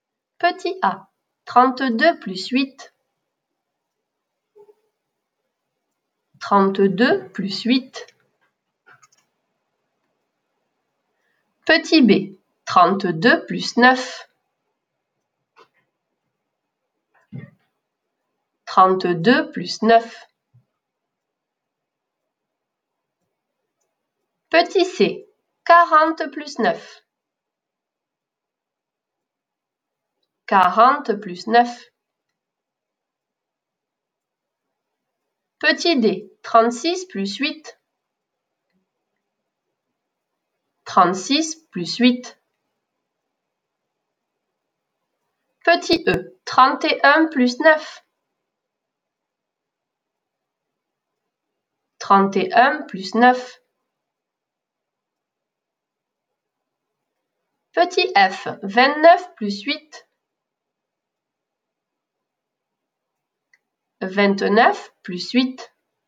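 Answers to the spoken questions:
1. 40
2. 41
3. 49
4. 44
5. 40
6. 37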